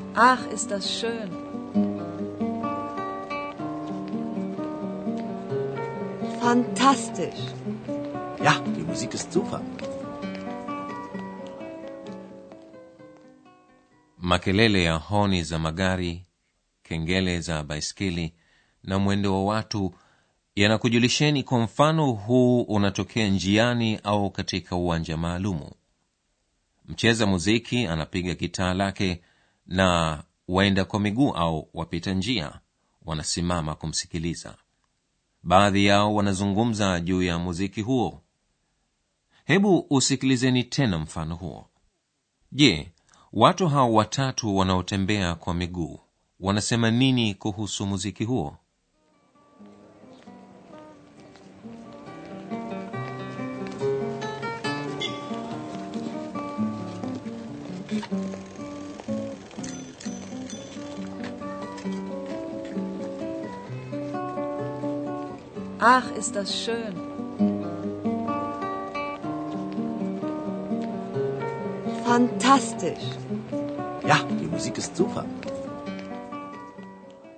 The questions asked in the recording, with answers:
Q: je watu hao watatu wanaotembea kwa miguu wanasema nini kuhusu muziki huo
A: Wote watatu wanafikiri kuwa muziki huo ni mzuri sana.